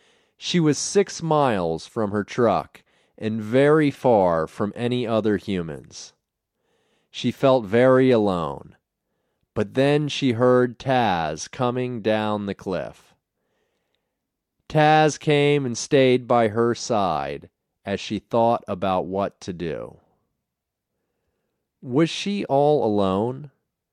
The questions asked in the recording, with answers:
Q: Was she all alone?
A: No, she wasn't all alone.